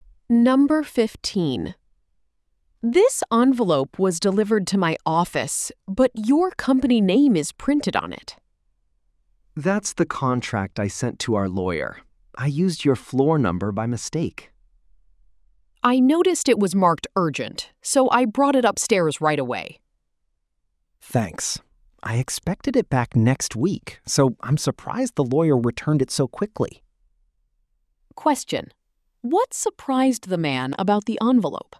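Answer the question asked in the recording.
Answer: The lawyer returned it so quickly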